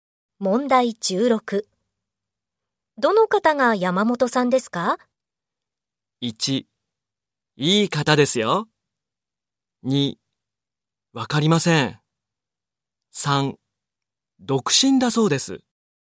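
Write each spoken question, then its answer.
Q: どの方が山本さんですか?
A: 1: わかりません。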